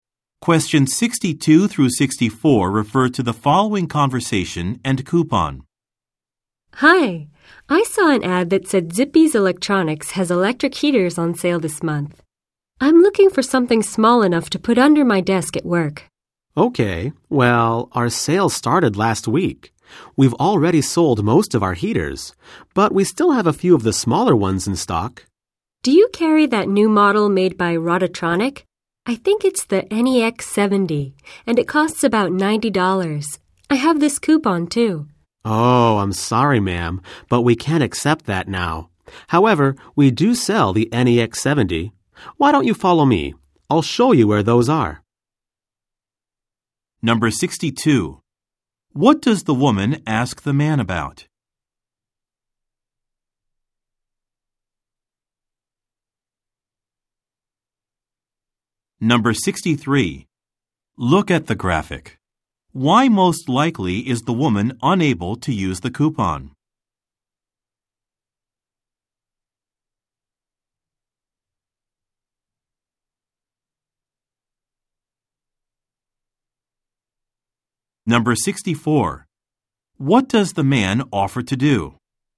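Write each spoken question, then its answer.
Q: What does the woman ask the man about?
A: Whether the store carries the new Rodotronic heater model, the NEX 70

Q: What does the man offer to do?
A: Show her where the NEX 70 heaters are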